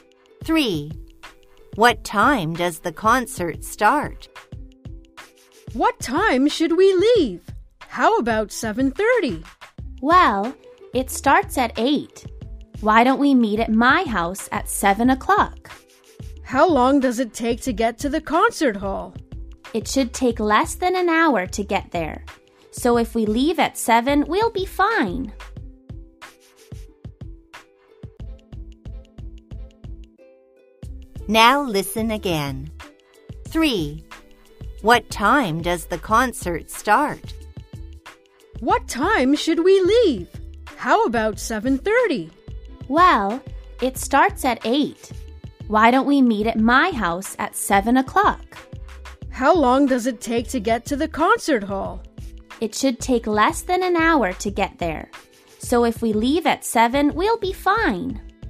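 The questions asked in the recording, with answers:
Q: What time does the concert start?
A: 8 o'clock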